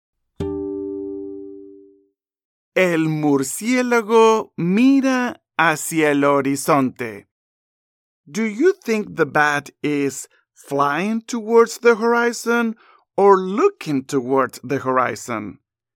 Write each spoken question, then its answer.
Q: do you think the bat is flying towards the horizon or looking towards the horizon?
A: Looking towards the horizon.